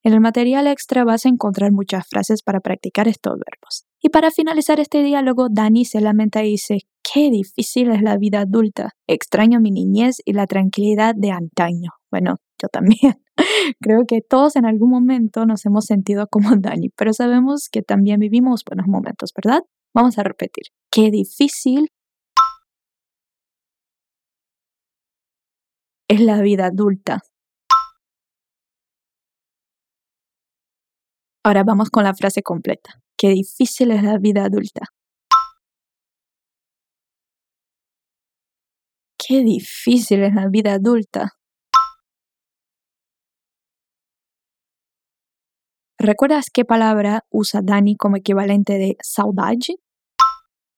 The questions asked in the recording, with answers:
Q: ¿Recuerdas qué palabra usa Dani como equivalente de saudade?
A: Extraño.